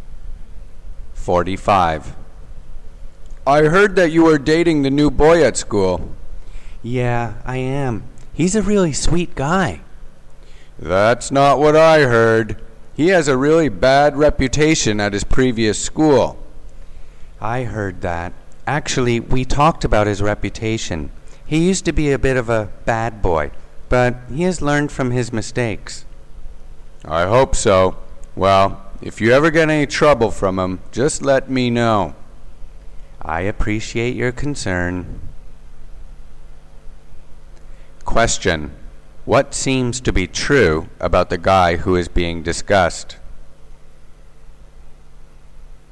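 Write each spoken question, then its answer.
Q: What seems to be true about the guy who is being discussed?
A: He had a bad reputation at his previous school but has learned from his mistakes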